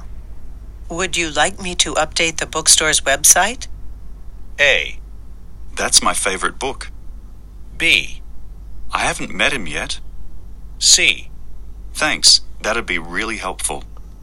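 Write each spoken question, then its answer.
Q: Would you like me to update the bookstore's website?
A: C: Thanks. That'd be really helpful.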